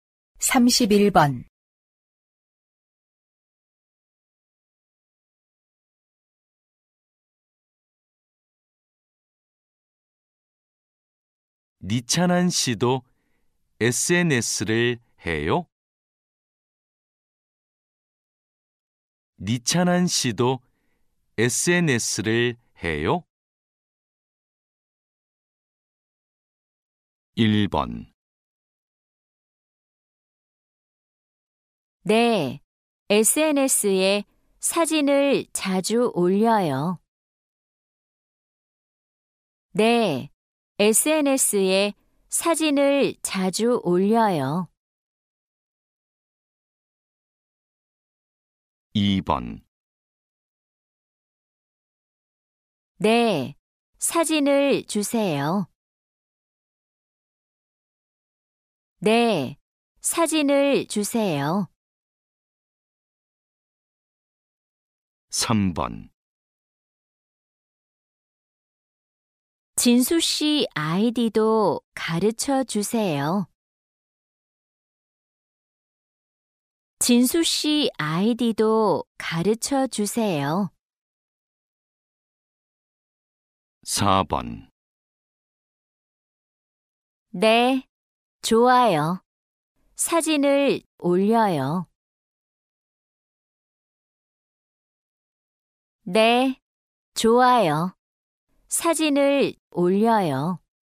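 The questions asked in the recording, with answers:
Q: 니찬한 씨도 SNS를 해요?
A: 1: 네, SNS에 사진을 자주 올려요.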